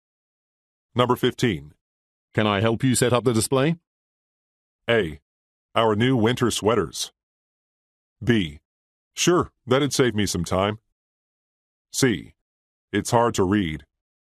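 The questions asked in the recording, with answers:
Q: Can I help you set up the display?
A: B: Sure, that'd save me some time.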